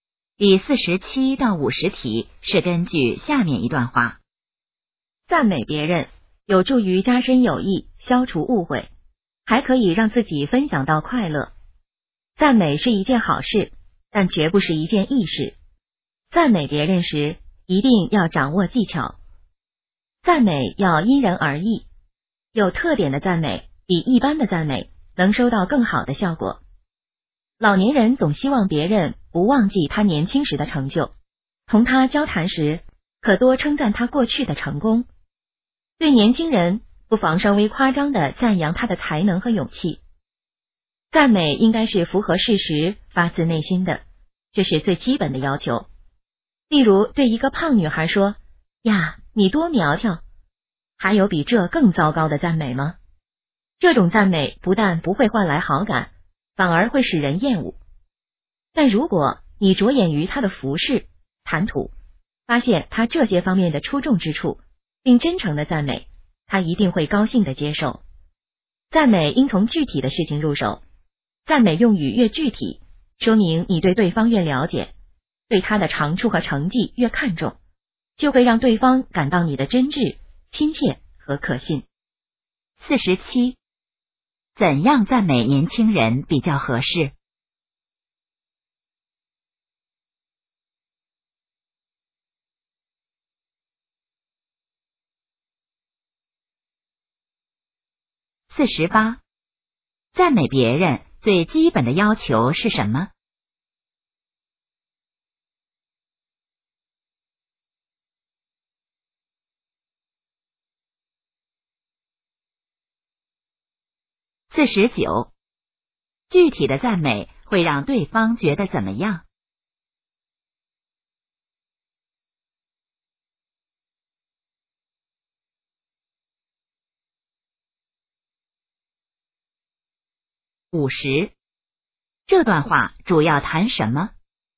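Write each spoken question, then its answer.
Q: 怎样赞美年轻人比较合适?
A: 稍微夸张地赞扬他的才能和勇气

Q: 赞美别人最基本的要求是什么?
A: 符合事实,发自内心

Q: 具体的赞美会让对方觉得怎么样?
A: 真挚、亲切和可信

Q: 这段话主要谈什么?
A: 赞美别人的技巧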